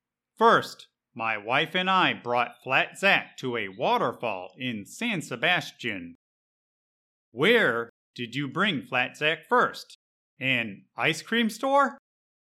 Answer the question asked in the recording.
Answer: No, the first place my wife and I brought Zack was to a waterfall in San Sebastian.